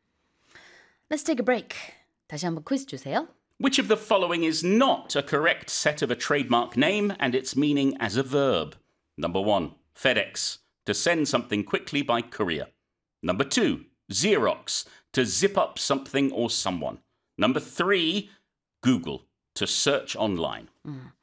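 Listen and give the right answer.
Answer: Number two: Xerox, to zip up something or someone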